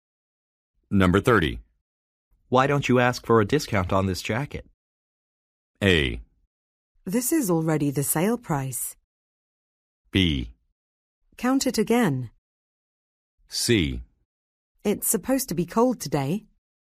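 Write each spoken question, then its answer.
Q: Why don't you ask for a discount on this jacket?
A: A: This is already the sale price.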